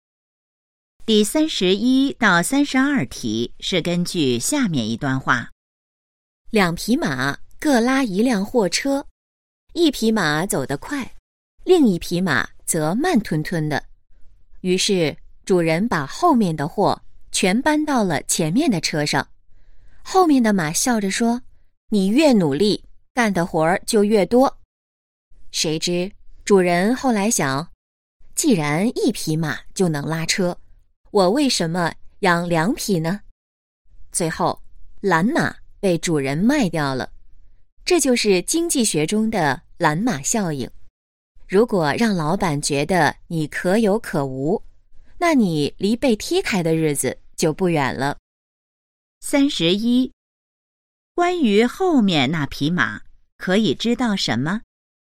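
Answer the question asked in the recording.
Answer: 它很懒,最后被主人卖掉了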